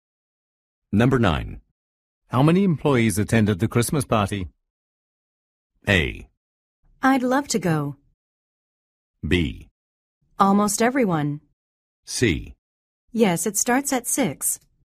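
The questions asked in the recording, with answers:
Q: How many employees attended the Christmas party?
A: B: Almost everyone.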